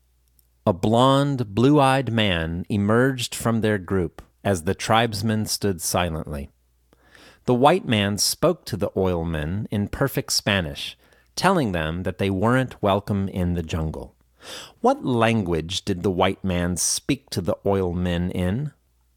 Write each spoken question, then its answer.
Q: What language did the white man speak to the oilmen in?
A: The white man spoke to the oilmen in perfect Spanish.